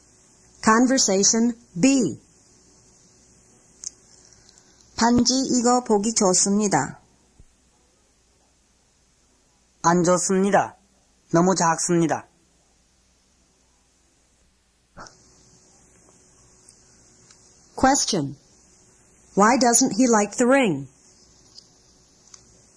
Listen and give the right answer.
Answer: 2 small.